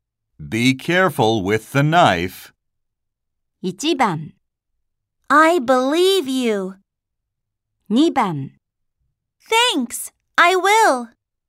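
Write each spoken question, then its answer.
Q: Be careful with the knife.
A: 2: Thanks, I will.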